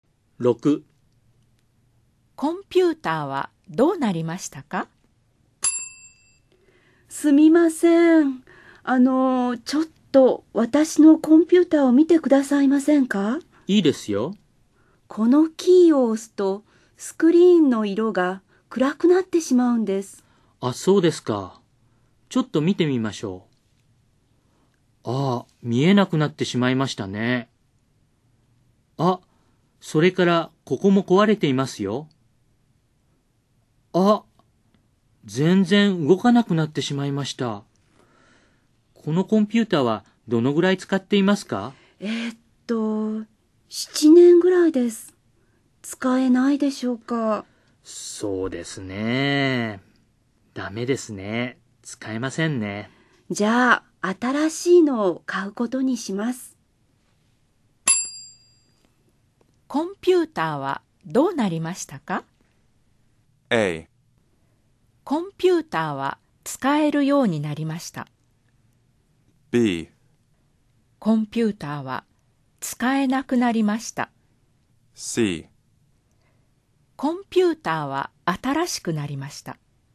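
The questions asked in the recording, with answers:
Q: コンピューターはどうなりましたか?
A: B: コンピューターは使えなくなりました。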